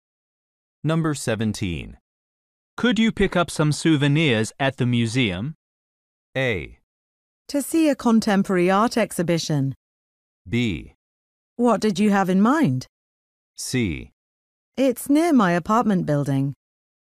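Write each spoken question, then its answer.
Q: Could you pick up some souvenirs at the museum?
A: B: What did you have in mind?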